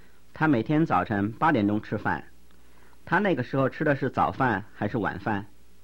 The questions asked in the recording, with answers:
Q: 他那个时候吃的是早饭还是晚饭?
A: 他那个时候吃的是早饭。